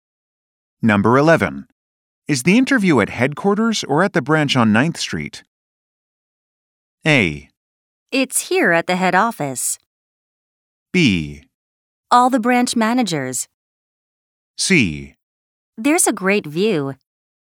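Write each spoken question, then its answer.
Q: Is the interview at headquarters or at the branch on 9th Street?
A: A: It's here at the head office.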